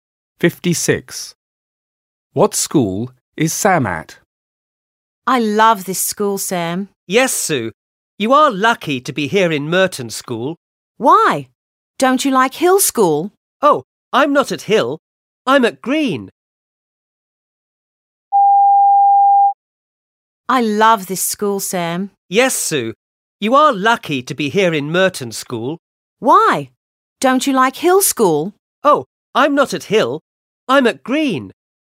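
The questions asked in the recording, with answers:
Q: What school is Sam at?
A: Green School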